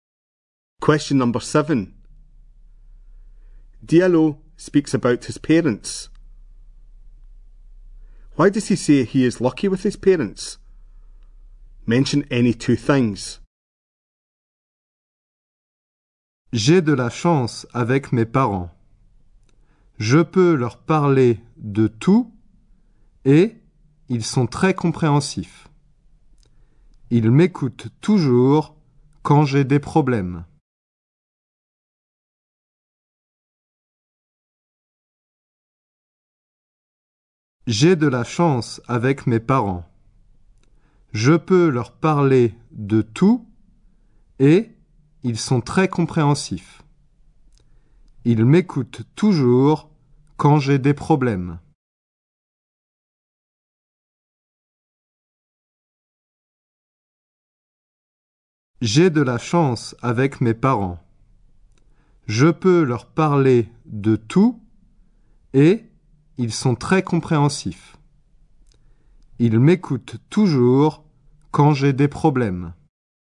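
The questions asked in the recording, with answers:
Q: Why does he say he is lucky with his parents?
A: He can talk to them about everything; they are very understanding; they always listen when he has problems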